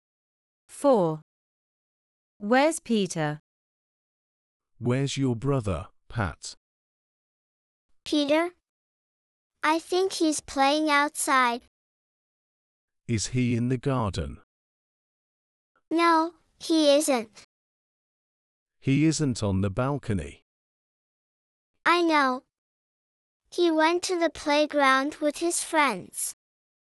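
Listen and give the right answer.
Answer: At the playground with his friends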